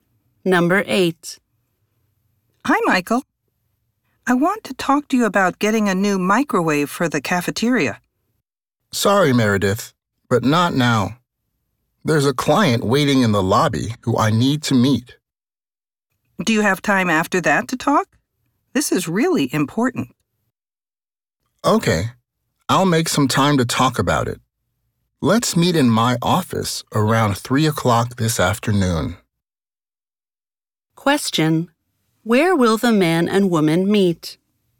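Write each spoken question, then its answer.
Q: Where will the man and woman meet?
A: In the man's office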